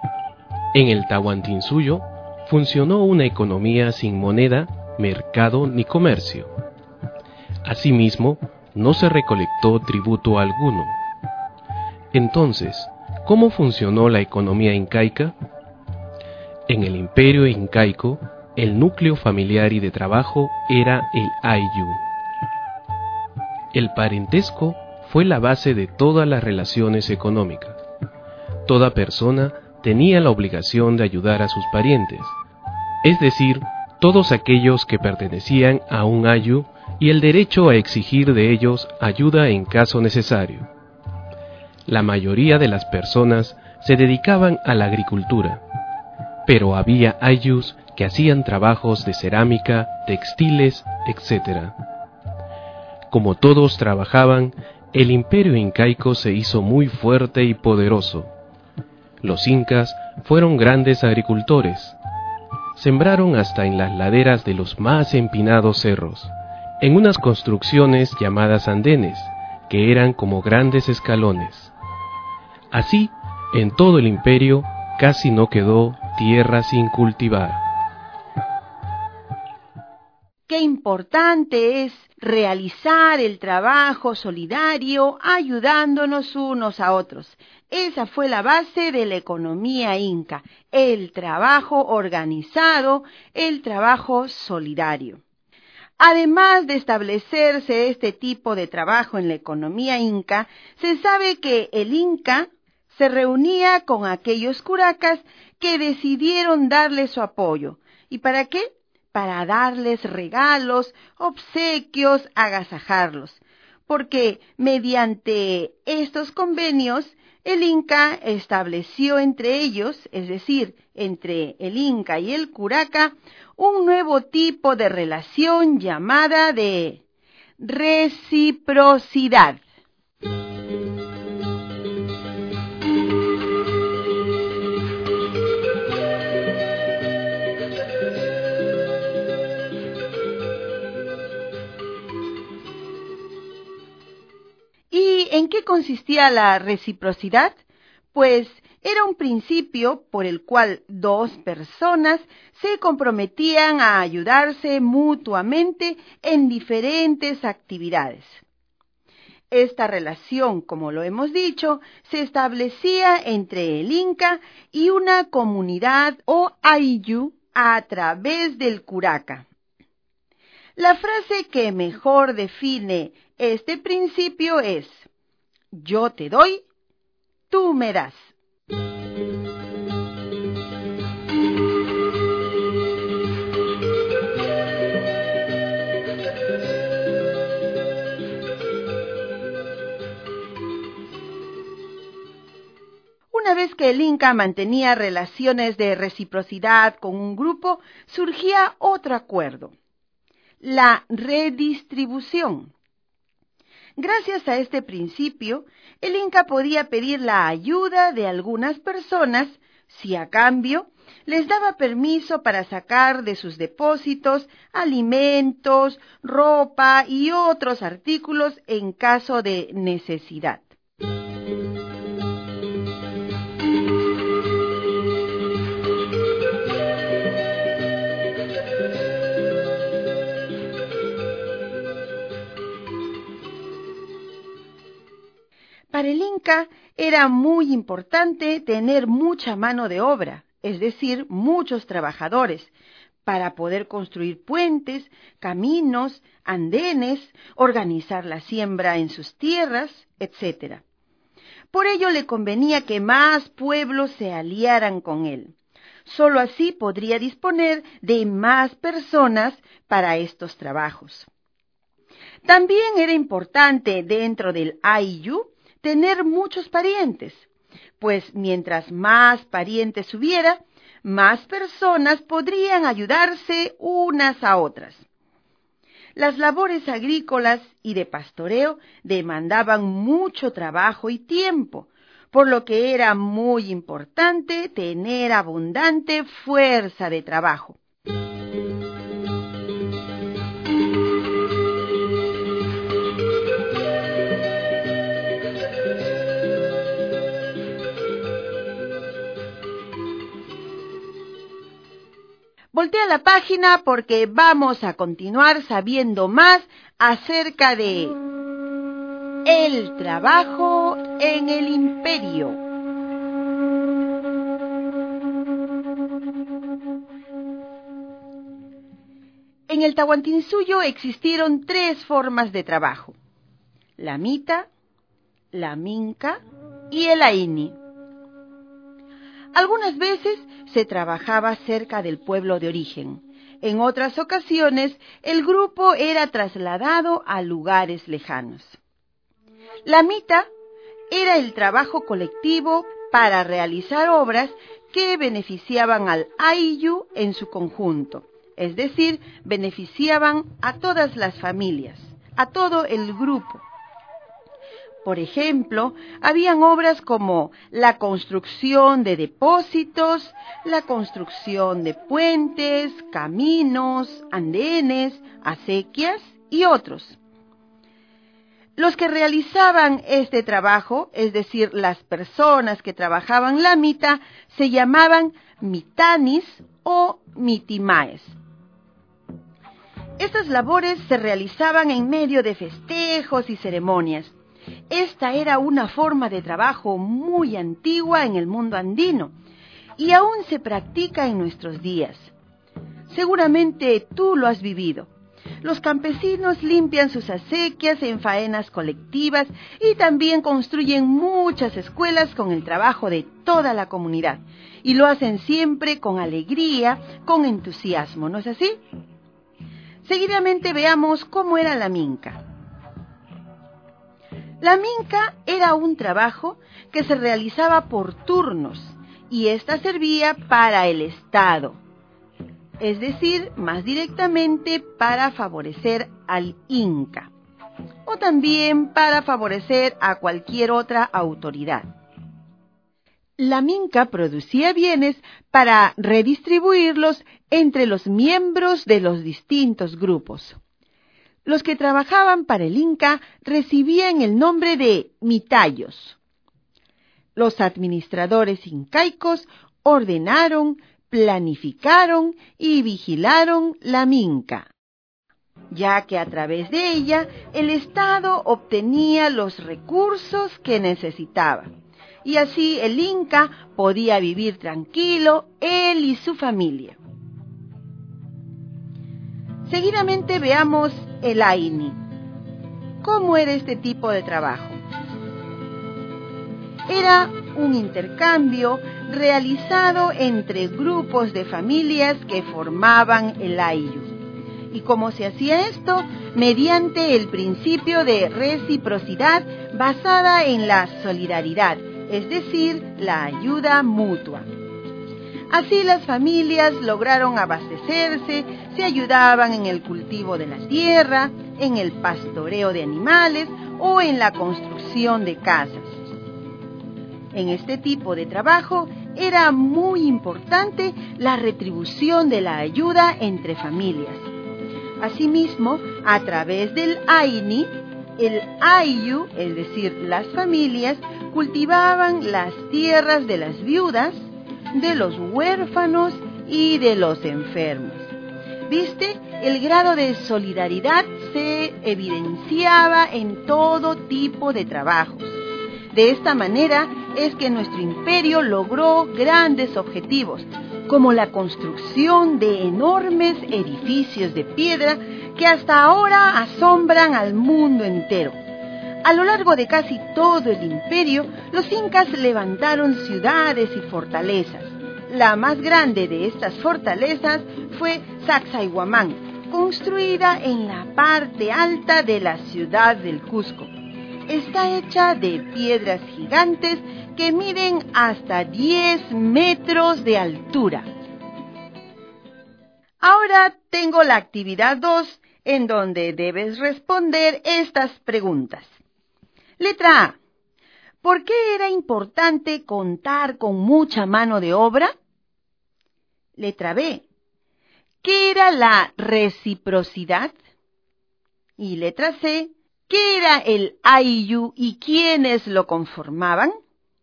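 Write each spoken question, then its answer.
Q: ¿Por qué era importante contar con mucha mano de obra?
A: Para construir puentes, caminos y andenes y organizar la siembra; con más parientes, más personas podían ayudarse

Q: ¿Qué era la reciprocidad?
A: Un principio por el cual dos personas se comprometían a ayudarse mutuamente: yo te doy, tú me das

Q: ¿Qué era el AIU y quiénes lo conformaban?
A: El ayllu era el núcleo familiar y de trabajo; lo conformaban los parientes, es decir, las familias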